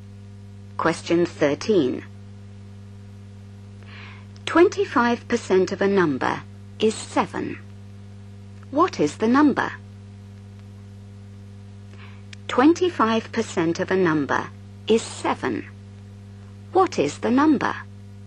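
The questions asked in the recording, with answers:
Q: 25% of a number is 7. What is the number?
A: 28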